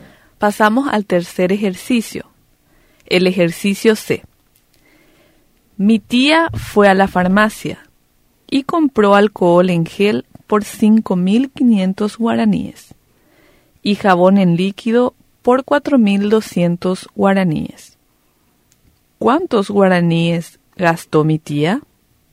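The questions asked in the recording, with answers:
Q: ¿Cuántos guaraníes gastó mi tía?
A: 9.700 guaraníes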